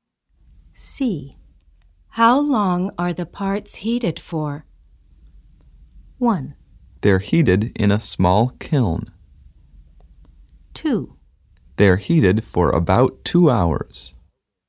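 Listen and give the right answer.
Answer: 2: They're heated for about 2 hours.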